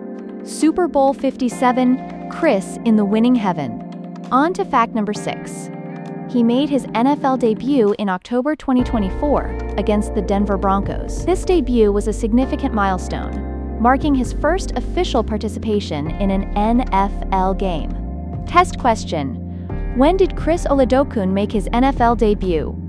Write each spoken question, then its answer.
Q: When did Chris Oladokun make his NFL debut?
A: October 22, 2024.